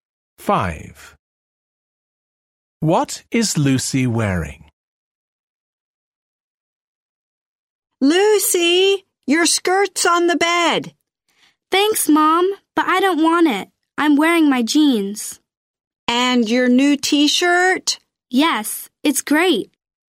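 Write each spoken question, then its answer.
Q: What is Lucy wearing?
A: Jeans and her new T-shirt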